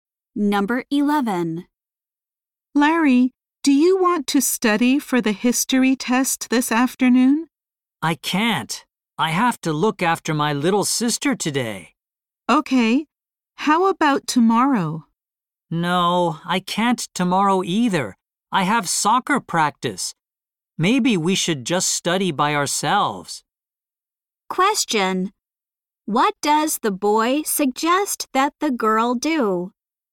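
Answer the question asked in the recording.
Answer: Study by herself.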